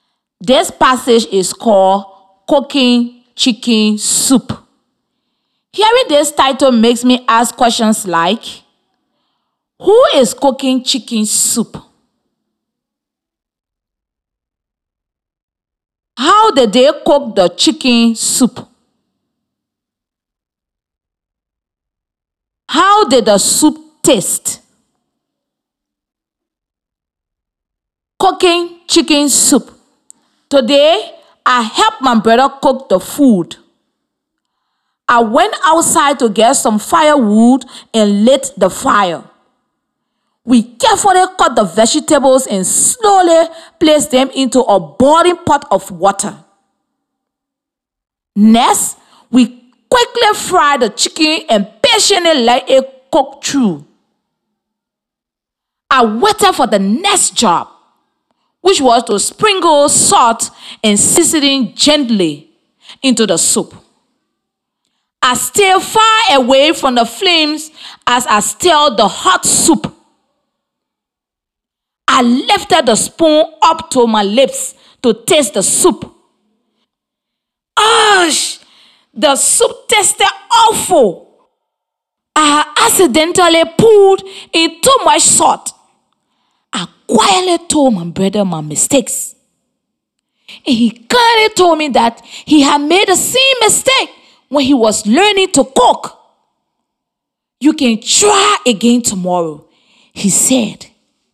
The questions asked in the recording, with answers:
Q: How did they cook the chicken soup?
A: So I know they cook the soup by boiling and frying because they had both verbs which describe cooking.

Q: How did the soup taste?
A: So, we know the soup tasted awful.